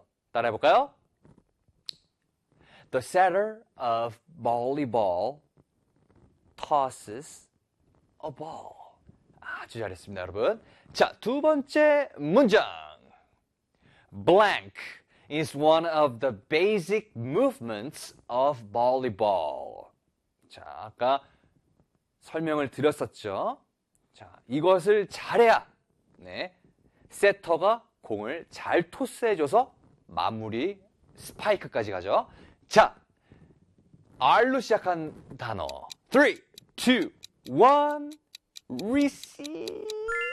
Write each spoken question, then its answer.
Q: Blank is one of the basic movements of volleyball.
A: receive.